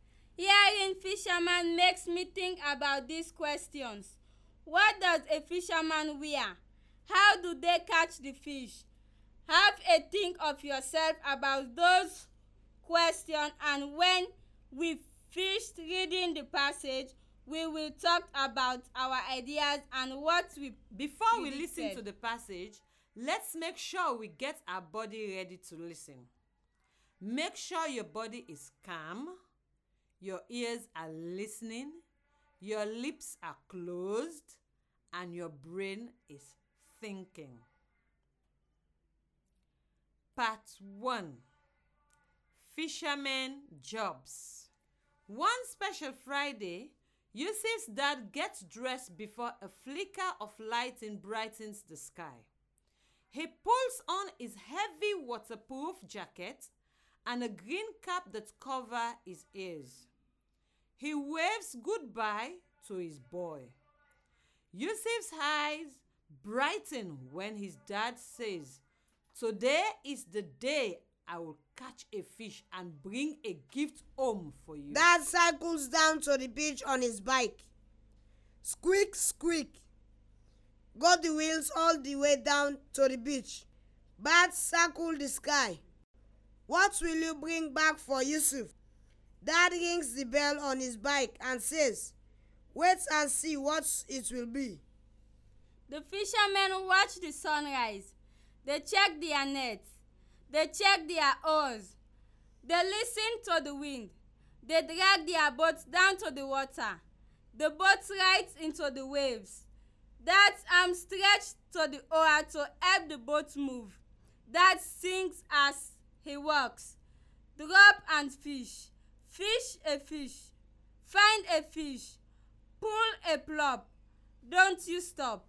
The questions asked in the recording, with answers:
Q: What does a fisherman wear?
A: Dad pulls on his heavy waterproof jacket and a green cap that covers his ears.